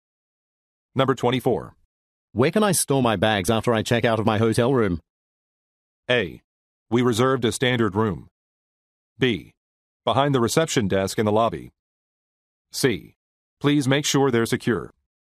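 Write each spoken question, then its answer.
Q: Where can I store my bags after I check out of my hotel room?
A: B: Behind the reception desk in the lobby.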